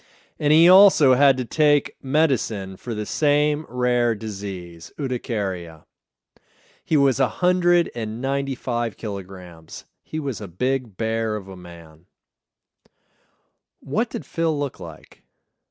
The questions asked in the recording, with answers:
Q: What did Phil look like?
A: Phil looked like a big bear of a man.